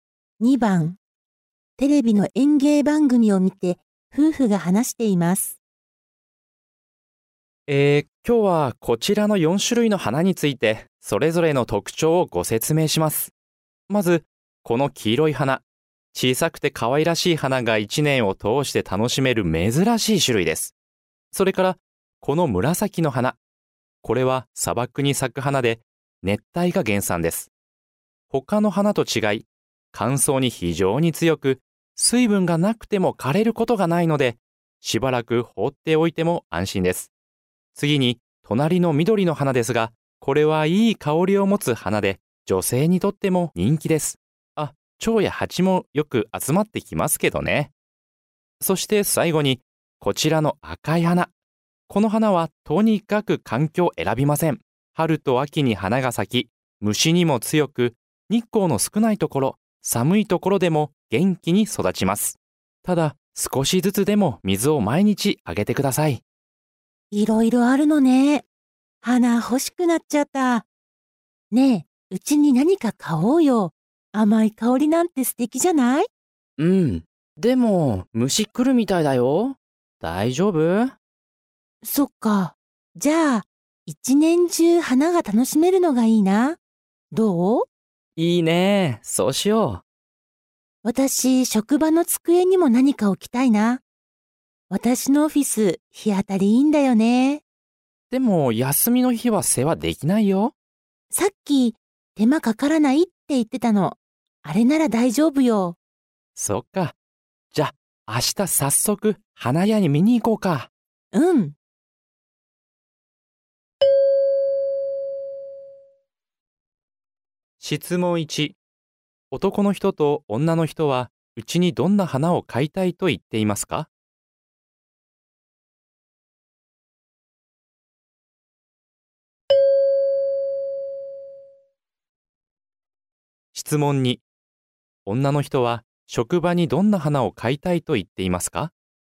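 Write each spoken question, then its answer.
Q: 男の人と女の人は、うちにどんな花を買いたいと言っていますか?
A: 黄色い花

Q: 女の人は、職場にどんな花を買いたいと言っていますか?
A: 紫の花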